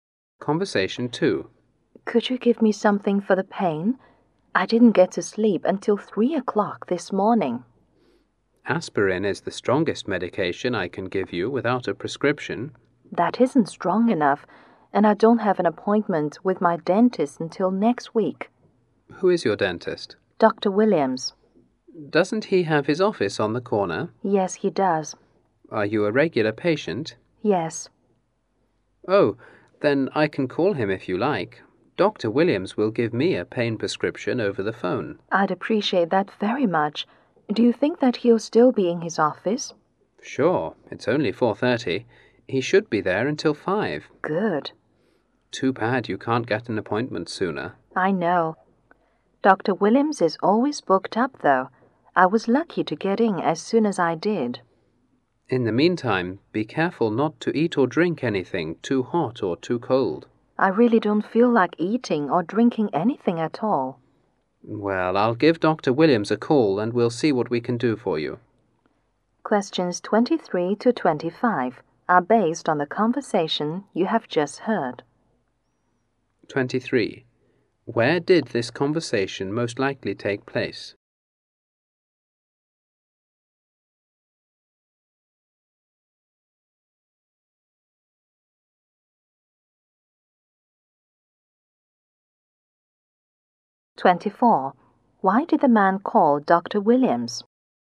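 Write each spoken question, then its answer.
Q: Where did this conversation most likely take place?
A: At a pharmacy.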